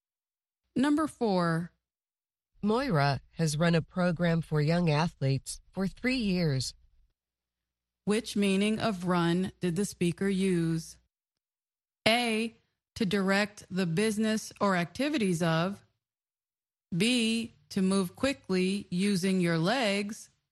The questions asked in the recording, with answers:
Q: Which meaning of run did the speaker use?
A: The answer is A, to direct the business or activities of.